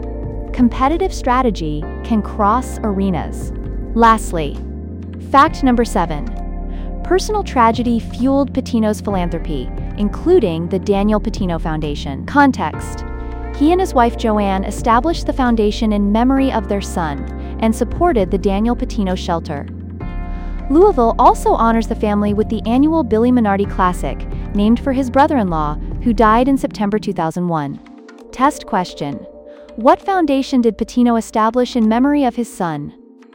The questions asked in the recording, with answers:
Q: What foundation did Patino establish in memory of his son?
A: the Daniel Patino Foundation.